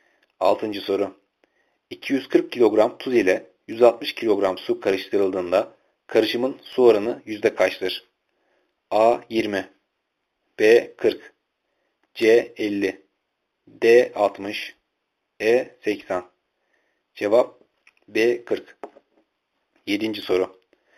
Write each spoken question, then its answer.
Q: 240 kilogram tuz ile 160 kilogram su karıştırıldığında karışımın su oranı yüzde kaçtır?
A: Cevap B. 40.